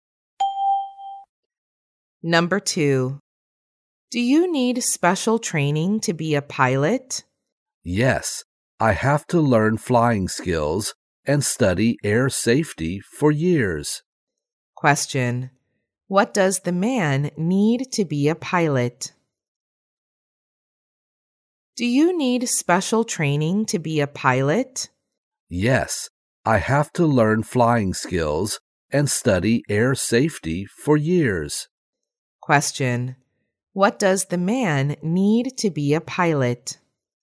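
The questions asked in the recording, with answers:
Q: What does the man need to be a pilot?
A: Special training: learning flying skills and studying air safety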